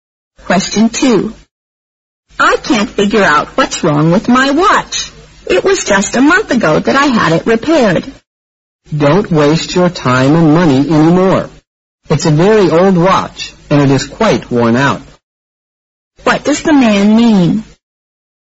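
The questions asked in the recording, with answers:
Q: What does the man mean?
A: The watch isn't worth repairing again; she should get a new one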